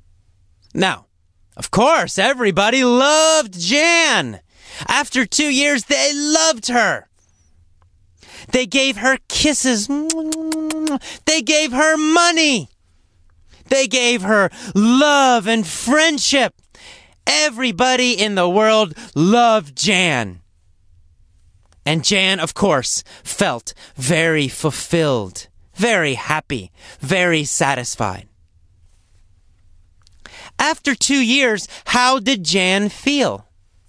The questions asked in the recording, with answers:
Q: After 2 years, how did Jan feel?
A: She felt fulfilled. She felt satisfied and very, very happy.